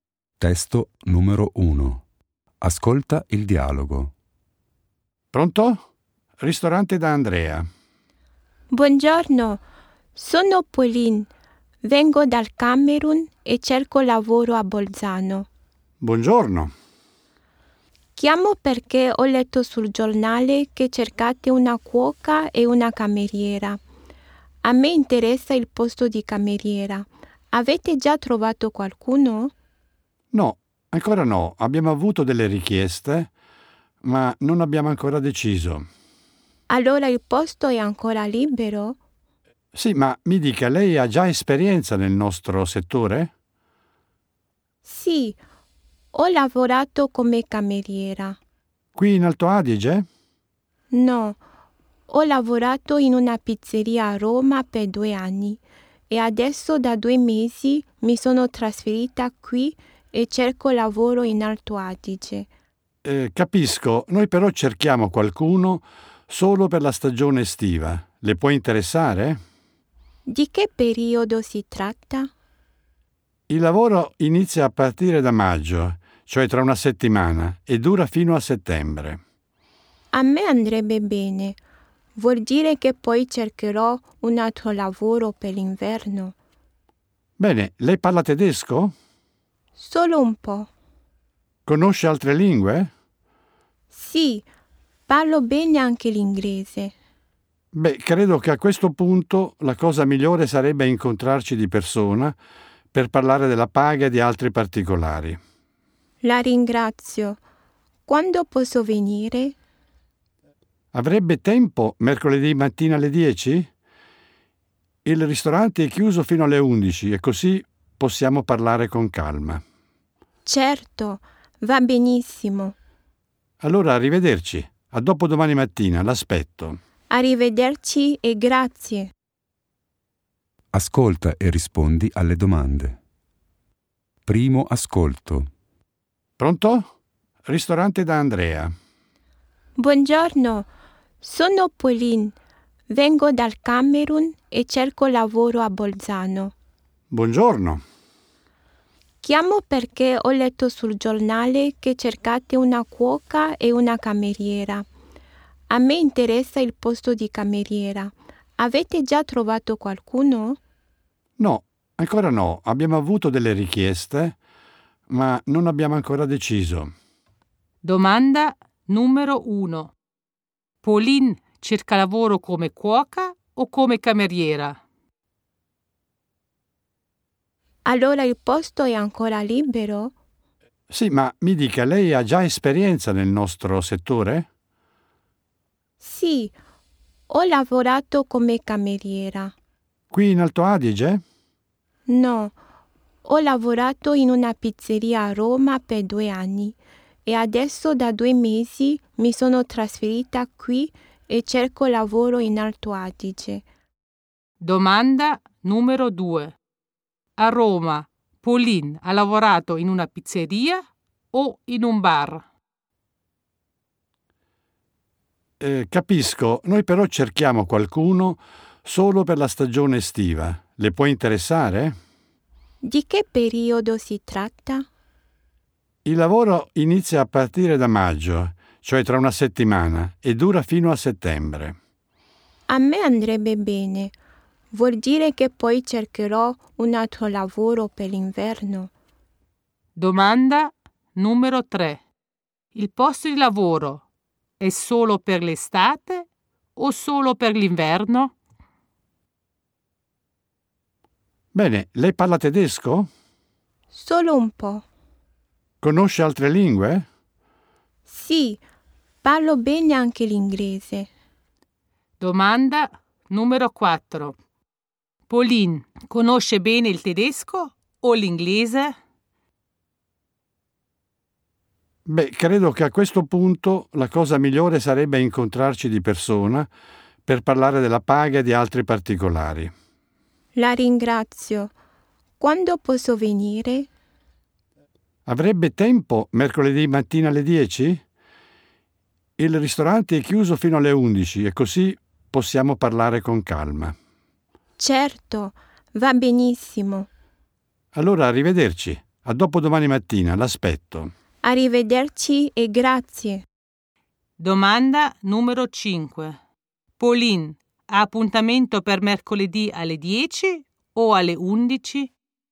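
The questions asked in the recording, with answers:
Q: Pauline cerca lavoro come cuoca o come cameriera?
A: come cameriera

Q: A Roma, Pauline ha lavorato in una pizzeria o in un bar?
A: in una pizzeria

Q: Il posto di lavoro è solo per l'estate o solo per l'inverno?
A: solo per l'estate

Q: Pauline conosce bene il tedesco o l'inglese?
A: l'inglese

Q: Pauline, ha appuntamento per mercoledì alle 10 o alle 11?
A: alle 10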